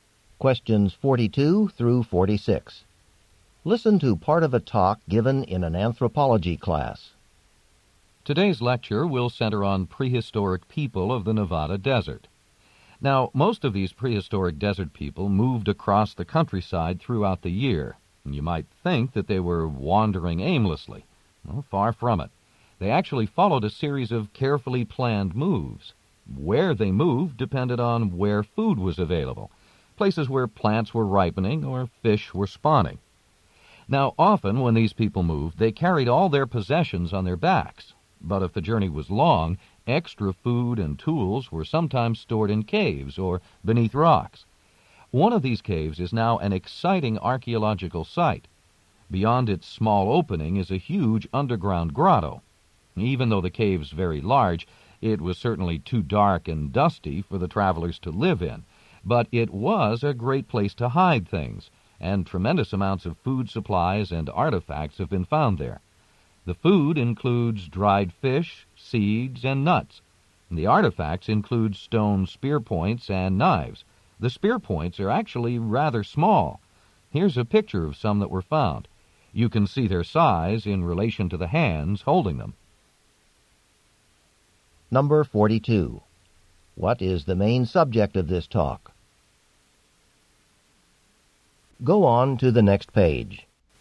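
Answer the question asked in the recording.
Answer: The prehistoric people of the Nevada desert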